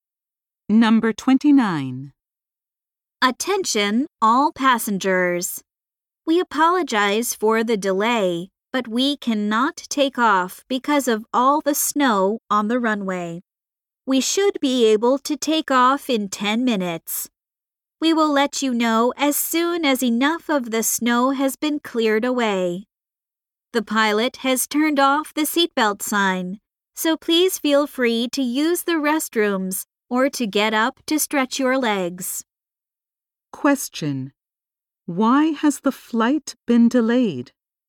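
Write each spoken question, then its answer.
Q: Why has the flight been delayed?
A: There is snow on the runway.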